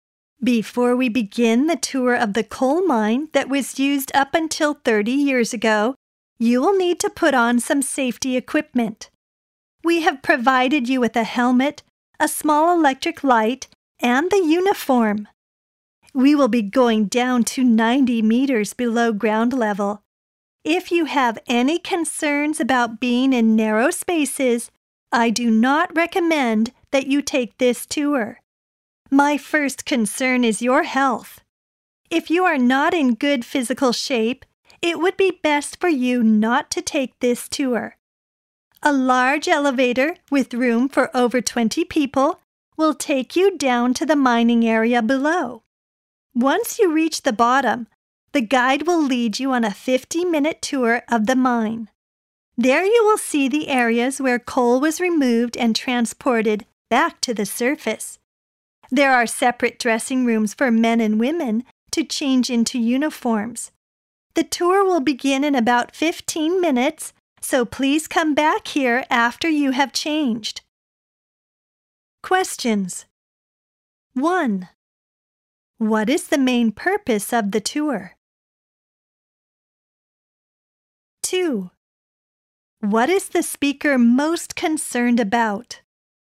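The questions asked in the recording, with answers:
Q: What is the speaker most concerned about?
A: The visitors' health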